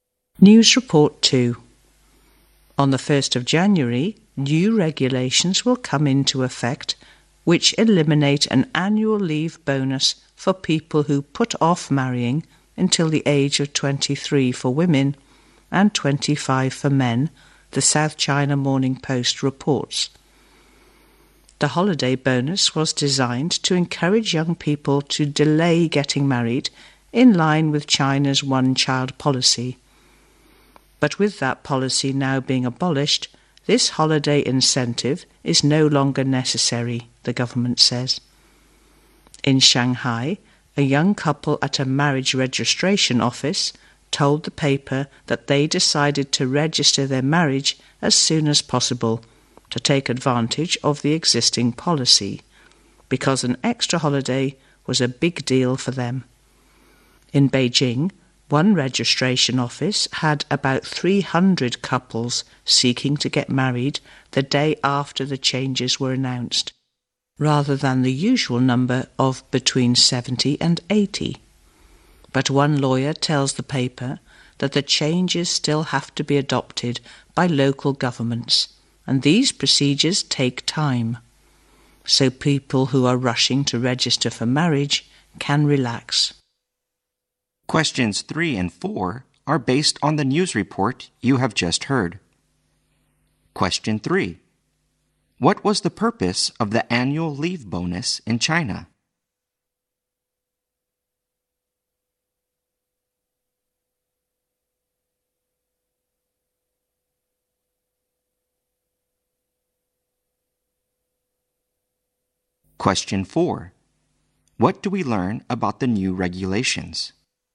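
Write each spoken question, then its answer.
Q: What was the purpose of the annual leave bonus in China?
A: To encourage young people to delay getting married.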